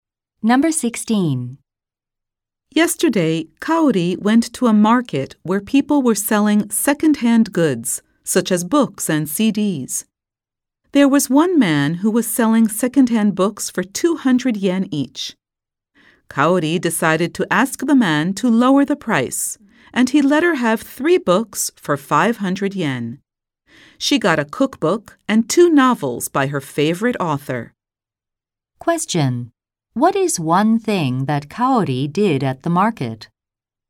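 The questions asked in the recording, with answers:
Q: What is one thing that Kaori did at the market?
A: She got the man to lower the price (3 books for 500 yen).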